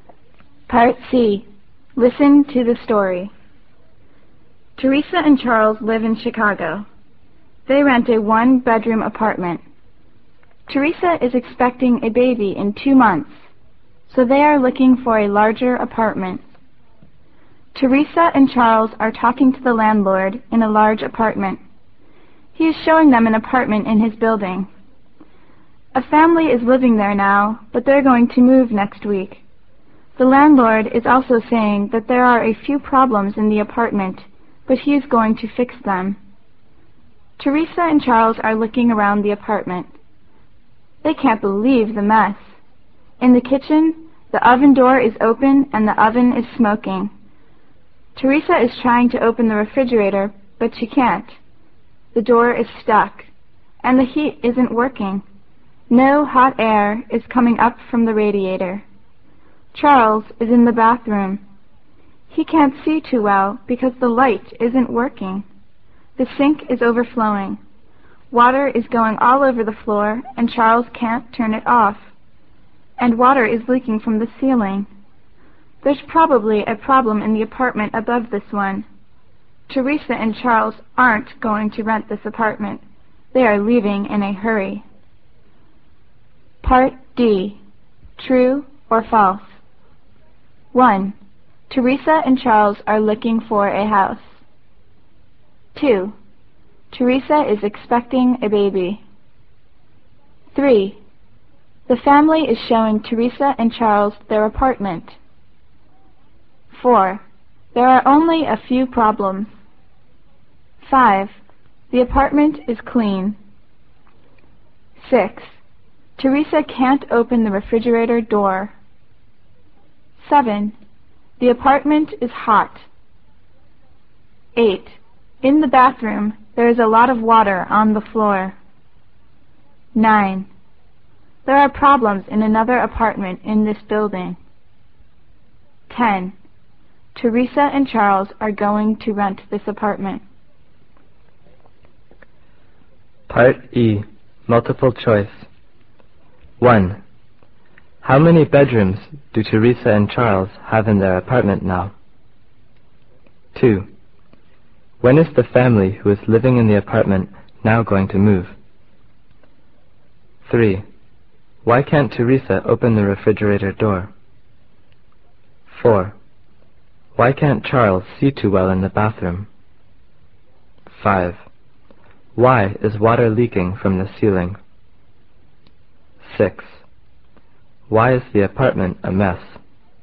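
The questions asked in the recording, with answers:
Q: Teresa and Charles are looking for a house.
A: False

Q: Teresa is expecting a baby.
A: True

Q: The family is showing Teresa and Charles their apartment.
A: False

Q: The apartment is clean.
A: False

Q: Teresa can't open the refrigerator door.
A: True

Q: The apartment is hot.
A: False

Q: In the bathroom, there is a lot of water on the floor.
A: True

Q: Teresa and Charles are going to rent this apartment.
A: False

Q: How many bedrooms do Teresa and Charles have in their apartment now?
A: One

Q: When is the family who is living in the apartment now going to move?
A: Next week

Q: Why can't Teresa open the refrigerator door?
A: The door is stuck

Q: Why can't Charles see too well in the bathroom?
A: The light isn't working

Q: Why is water leaking from the ceiling?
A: There's probably a problem in the apartment above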